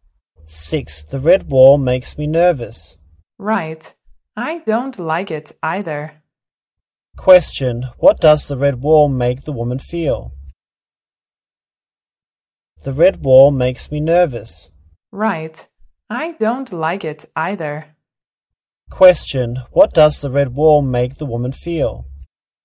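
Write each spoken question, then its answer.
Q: what does the red wall make the woman feel?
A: Nervous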